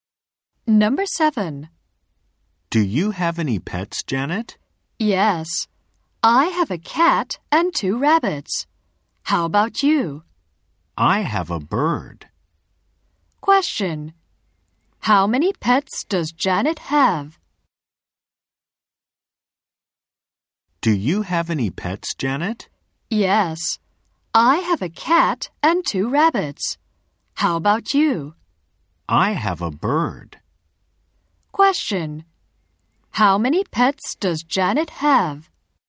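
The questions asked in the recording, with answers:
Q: How many pets does Janet have?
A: Three.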